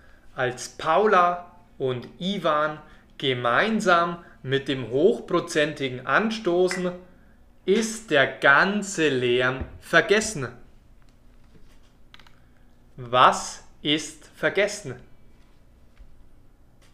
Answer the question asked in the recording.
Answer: Der ganze Lärm.